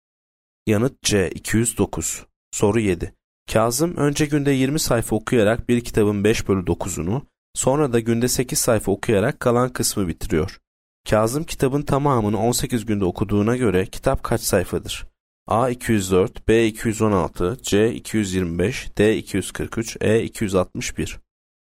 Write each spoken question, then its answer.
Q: Kazım kitabın tamamını 18 günde okuduğuna göre kitap kaç sayfadır?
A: Yanıt B 216.